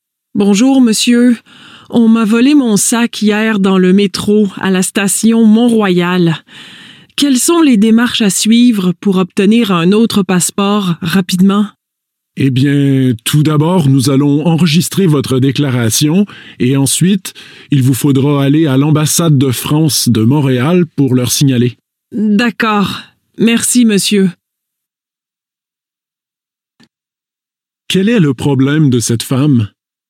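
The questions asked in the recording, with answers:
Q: Quel est le problème de cette femme ?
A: On lui a volé son sac (avec son passeport) dans le métro.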